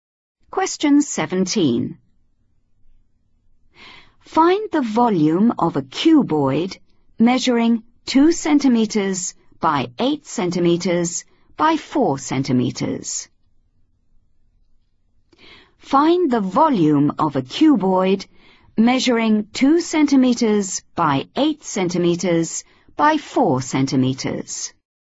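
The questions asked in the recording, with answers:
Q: Find the volume of a cuboid measuring 2 centimeters by 8 centimeters by 4 centimeters.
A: 64 cm3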